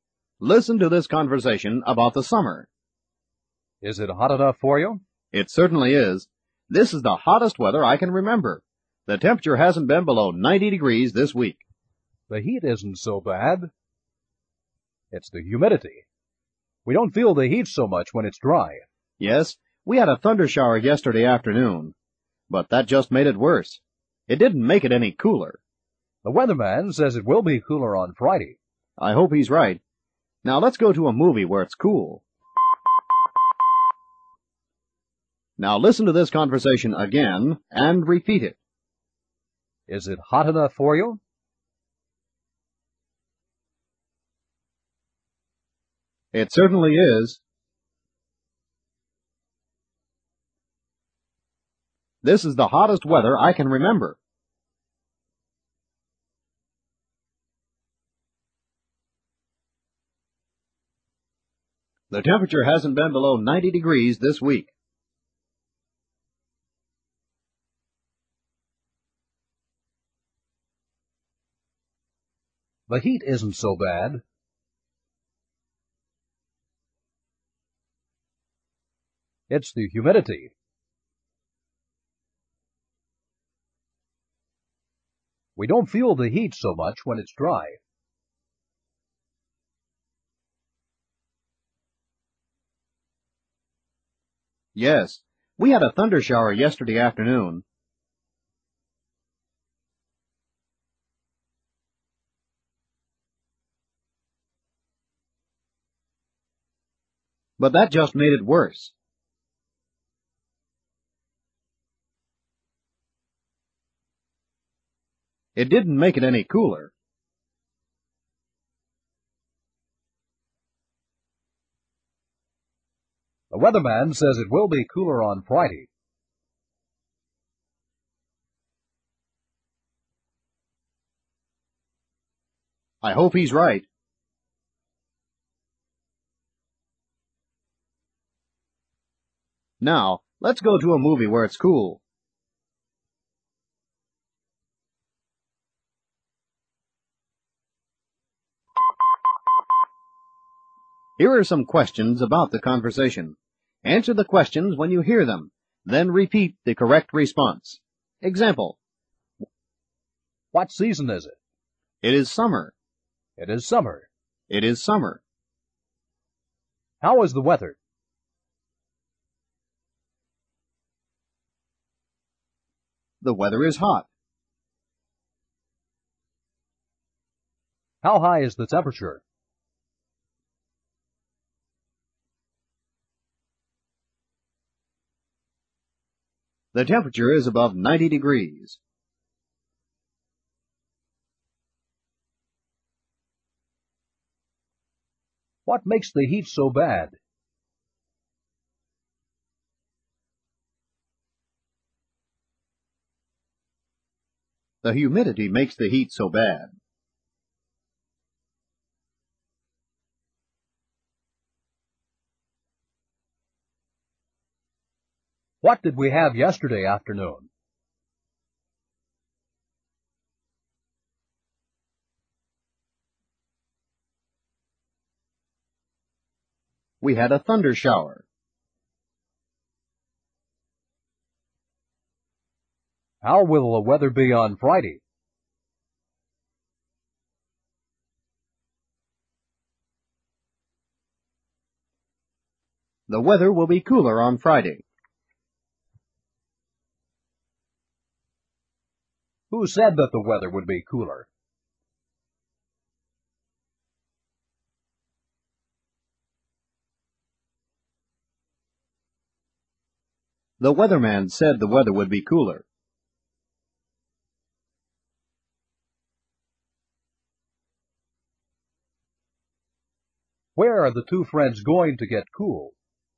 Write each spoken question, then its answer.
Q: How is the weather?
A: The weather is hot.

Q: How high is the temperature?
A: The temperature is above 90 degrees.

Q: What makes the heat so bad?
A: The humidity makes the heat so bad.

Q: What did we have yesterday afternoon?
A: We had a thunder shower.

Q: How will the weather be on Friday?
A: The weather will be cooler on Friday.

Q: Who said that the weather would be cooler?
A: The weatherman said the weather would be cooler.

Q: Where are the two friends going to get cool?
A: They are going to a movie to get cool.